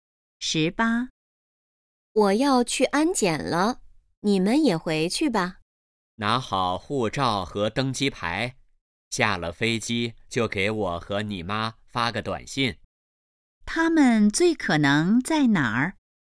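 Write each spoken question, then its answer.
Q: 他们最可能在哪儿?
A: 机场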